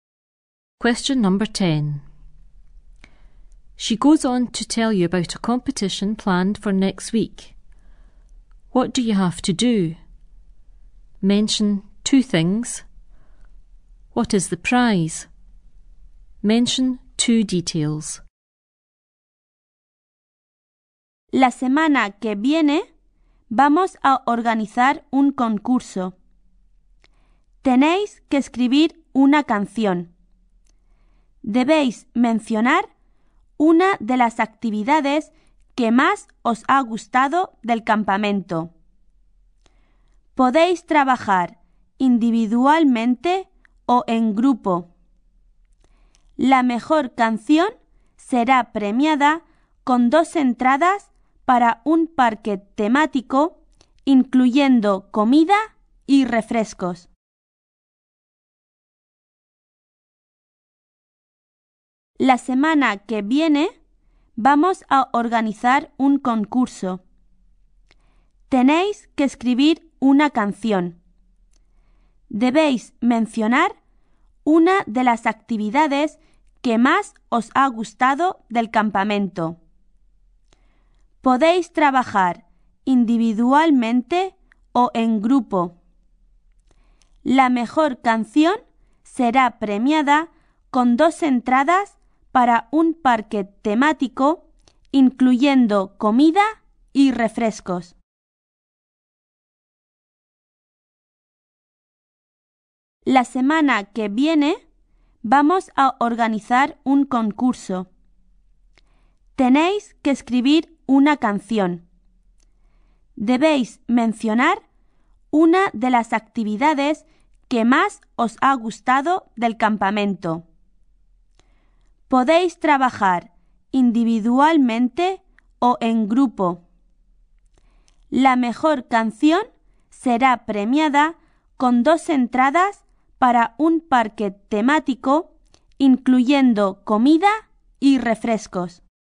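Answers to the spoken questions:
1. Write a song mentioning one of your favourite camp activities (alone or in a group)
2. Two tickets to a theme park, including food and soft drinks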